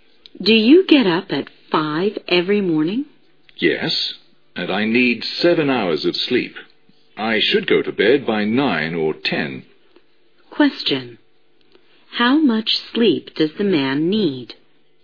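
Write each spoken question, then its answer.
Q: How much sleep does the man need?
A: 7 hours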